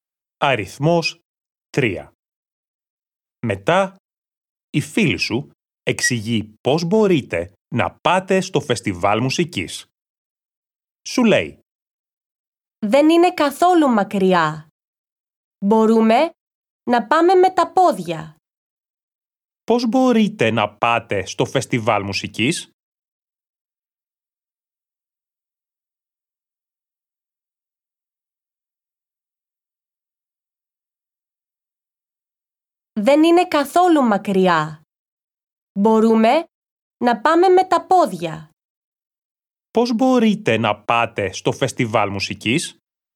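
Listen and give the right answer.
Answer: Με τα πόδια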